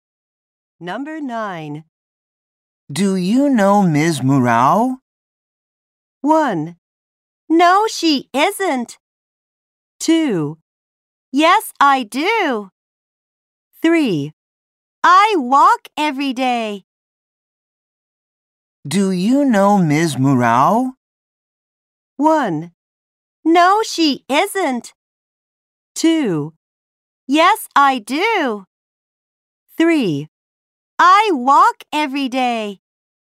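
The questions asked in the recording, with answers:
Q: Do you know Ms. Murao?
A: 2: Yes, I do.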